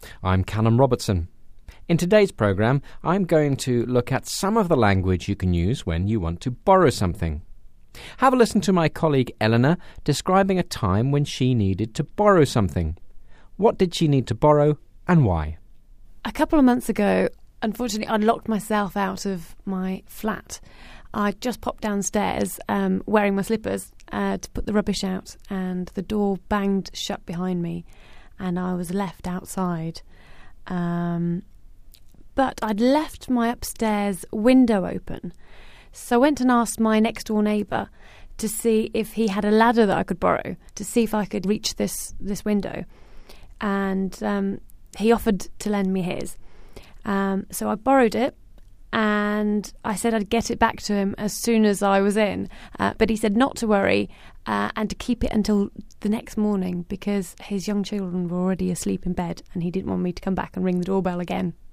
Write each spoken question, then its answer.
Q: What did she need to borrow and why?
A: What was it? It was a ladder.